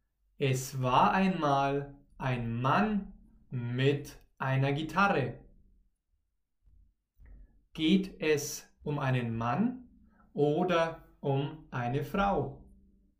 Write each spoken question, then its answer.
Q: Geht es um einen Mann? oder um eine Frau,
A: um einen Mann. Es geht um einen Mann.